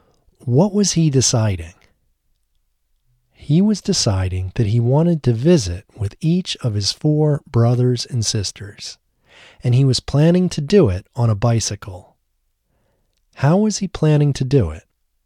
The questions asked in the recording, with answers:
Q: How was he planning to do it?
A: He was planning to do it on a bicycle.